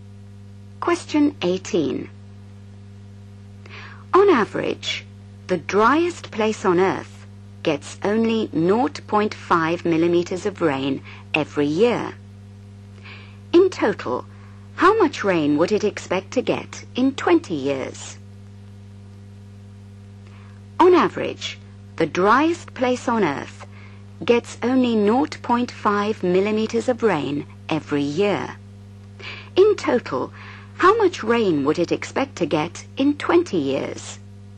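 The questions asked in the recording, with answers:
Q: In total, how much rain would it expect to get in 20 years?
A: 10 mm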